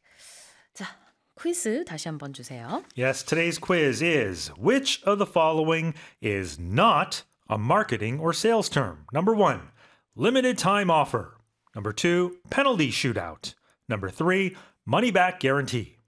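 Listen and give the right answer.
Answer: 2: penalty shootout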